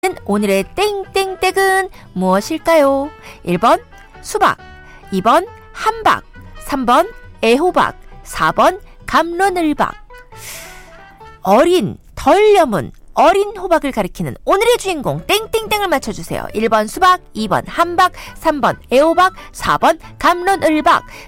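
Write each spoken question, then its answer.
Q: 오늘의 땡땡땡은 무엇일까요? 1번 수박, 2번 함박, 3번 애호박, 4번 감론을박.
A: 3: 애호박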